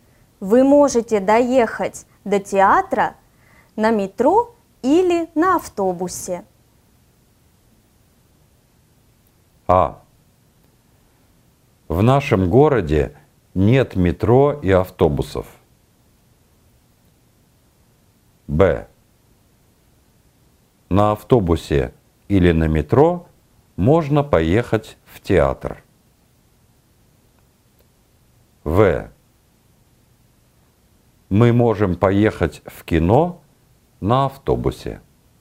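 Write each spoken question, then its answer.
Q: Вы можете доехать до театра на метро или на автобусе.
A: Б: На автобусе или на метро можно поехать в театр.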